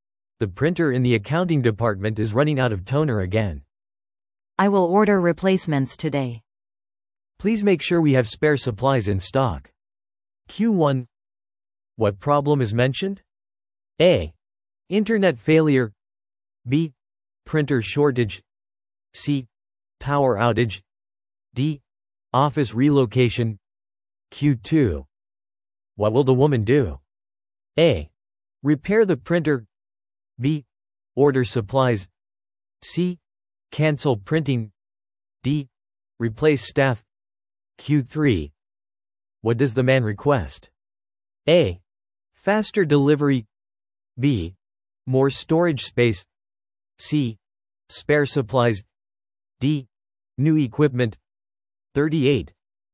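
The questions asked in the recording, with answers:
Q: What problem is mentioned?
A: B: Printer shortage.

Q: What will the woman do?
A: B: Order supplies.

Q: What does the man request?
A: C: Spare supplies.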